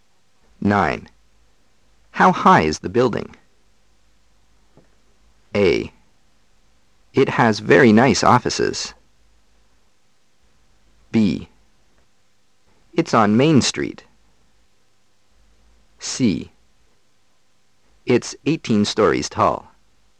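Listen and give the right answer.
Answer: C: It's 18 stories tall.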